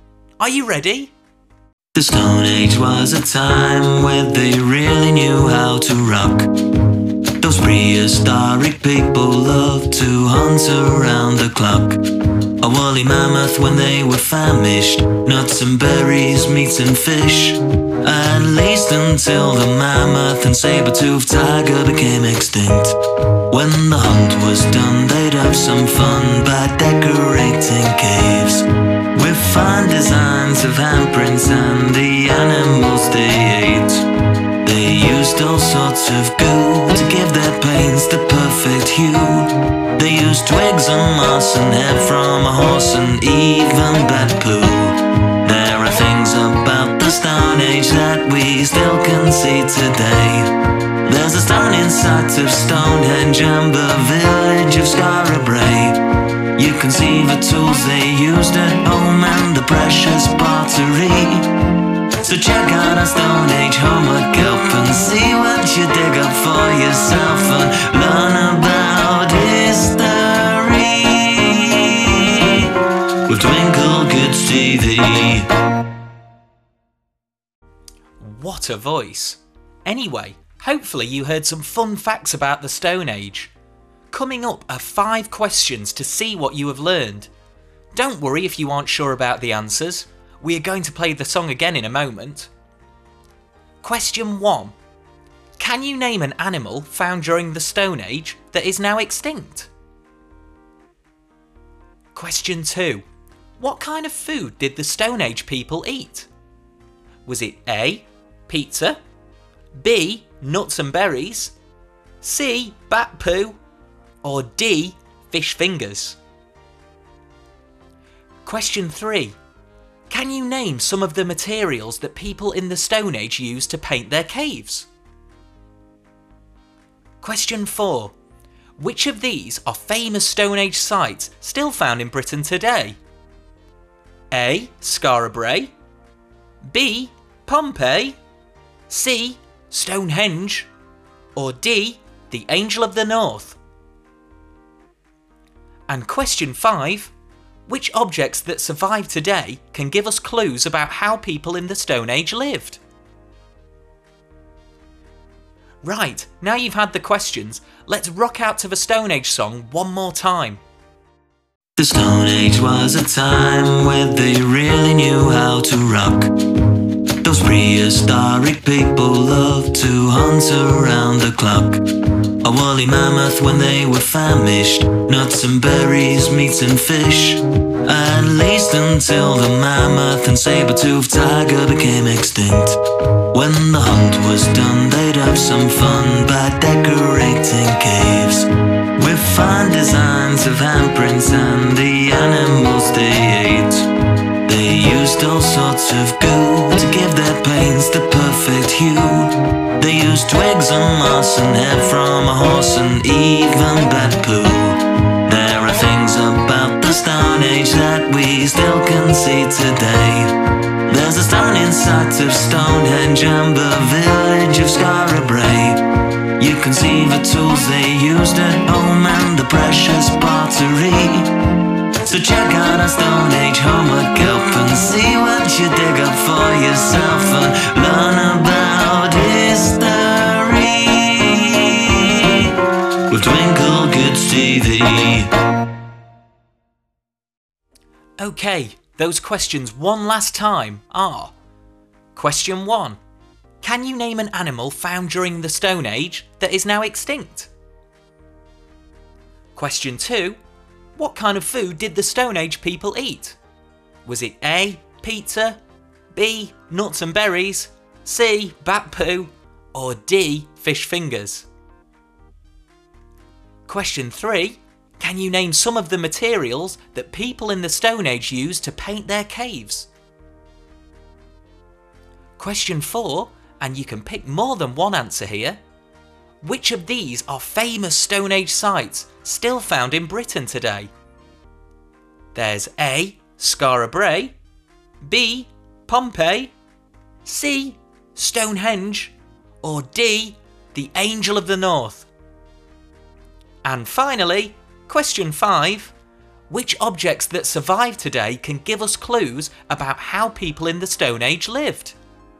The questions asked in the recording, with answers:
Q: Can you name an animal found during the Stone Age that is now extinct?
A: And the answers are either the saber-toothed tiger or the woolly mammoth.

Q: What kind of food did the Stone Age people eat?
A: so the answer was B, nuts and berries.

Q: Can you name some of the materials that people in the Stone Age used to paint their caves?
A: the answers are twigs, moss, horsehair, and even bat poo.

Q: Which of these are famous Stone Age sites still found in Britain today?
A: so the answers are Scarabray Brae and Stonehenge.

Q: Which objects that survive today can give us clues about how people in the Stone Age lived?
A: there are tools and pottery that tell us more about these fascinating folk.